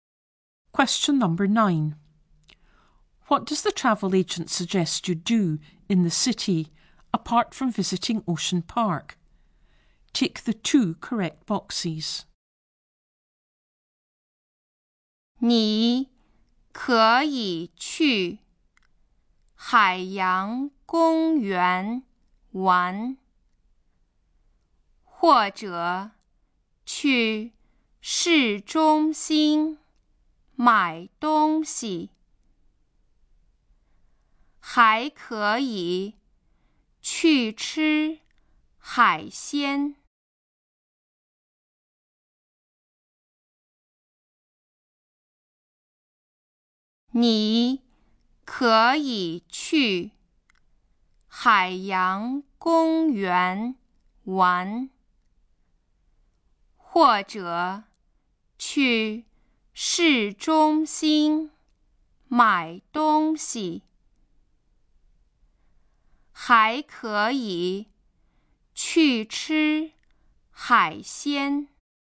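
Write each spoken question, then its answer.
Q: What does the travel agent suggest you do in the city, apart from visiting Ocean Park?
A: Go shopping in the city centre and eat seafood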